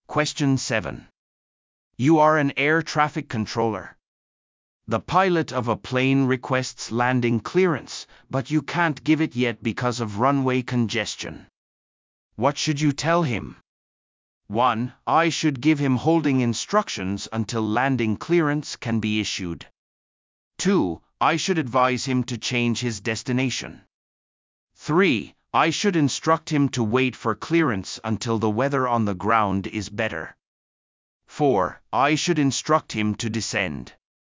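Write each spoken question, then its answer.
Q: What should you tell him?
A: 1: I should give him holding instructions until landing clearance can be issued.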